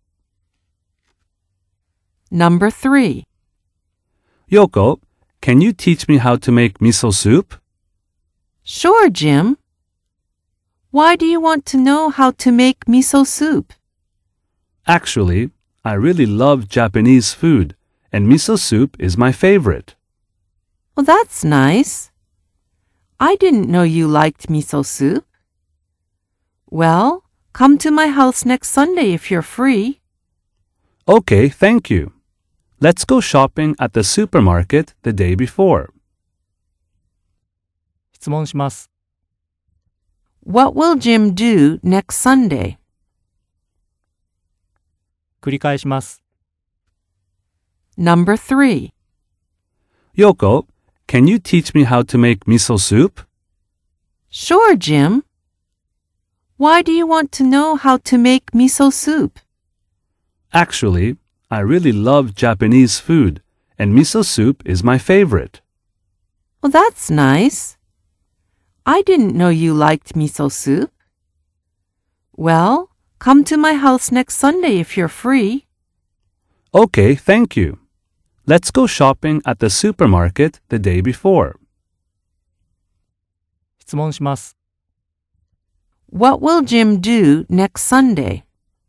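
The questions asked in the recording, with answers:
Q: What will Jim do next Sunday?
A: He will go to Yoko's house to learn how to make miso soup.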